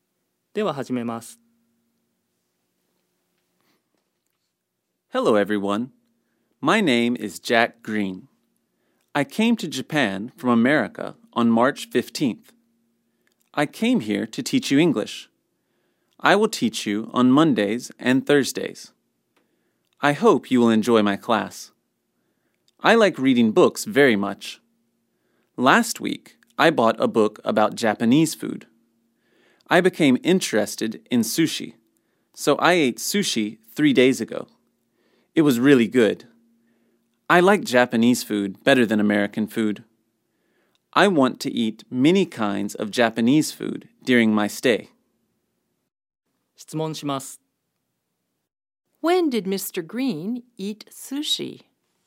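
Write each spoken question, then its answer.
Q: When did Mr. Green eat sushi?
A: He ate sushi three days ago.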